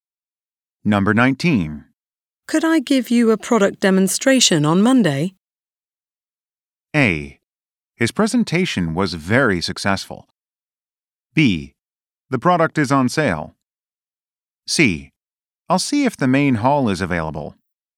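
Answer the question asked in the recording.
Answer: C: I'll see if the main hall is available.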